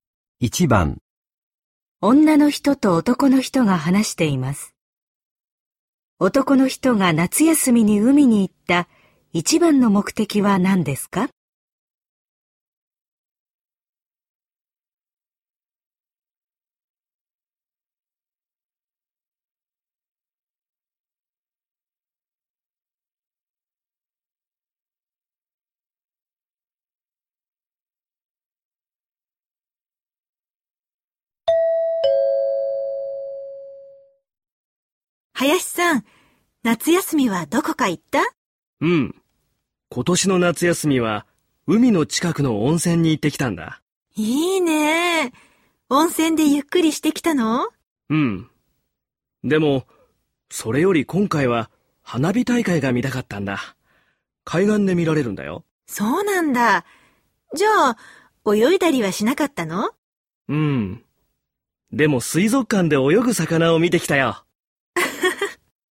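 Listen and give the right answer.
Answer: 花火大会を見ること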